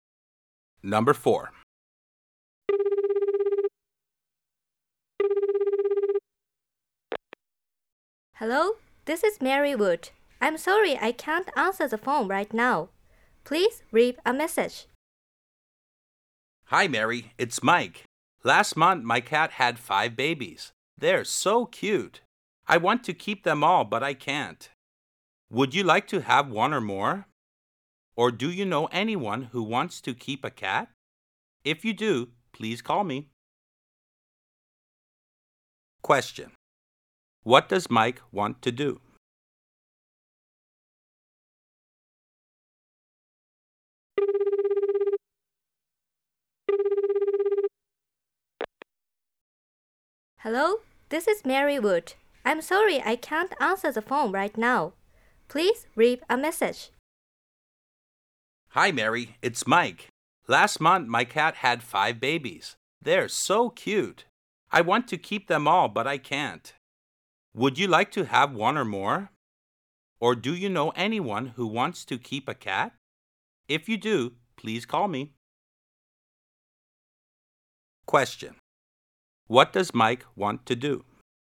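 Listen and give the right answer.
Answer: Find someone to keep his cat's babies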